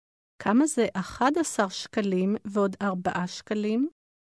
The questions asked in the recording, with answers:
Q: כמה זה 11 שקלים ועוד 4 שקלים?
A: 15 שקלים.